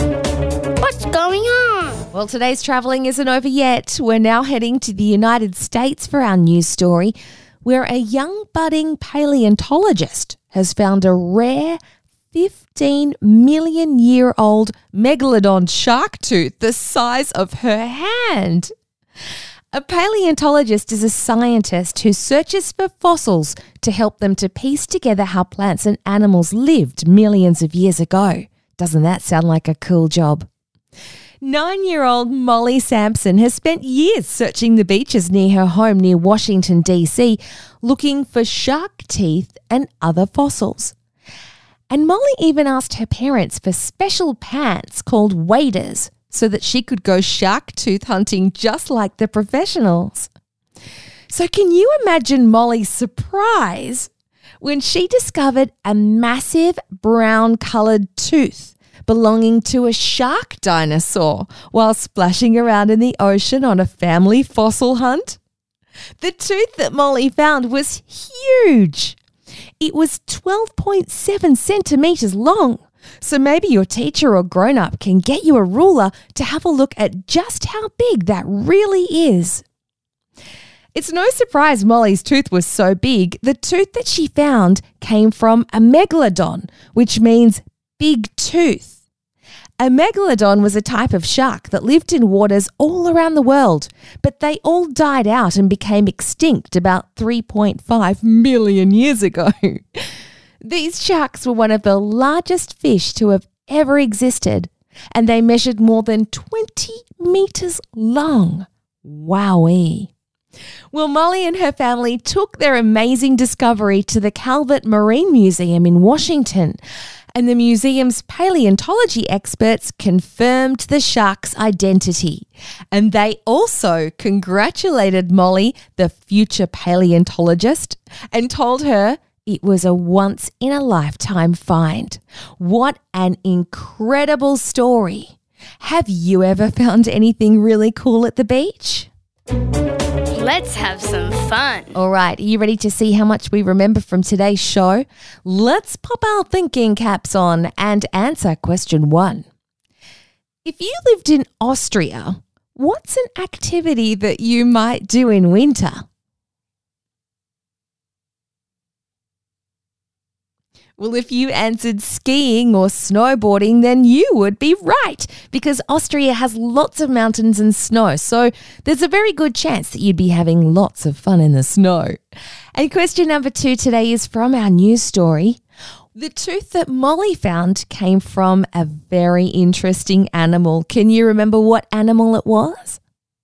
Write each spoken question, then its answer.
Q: The tooth that Molly found came from a very interesting animal. Can you remember what animal it was?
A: Well, if you said a shark, or even better, a megalodon, then you're correct.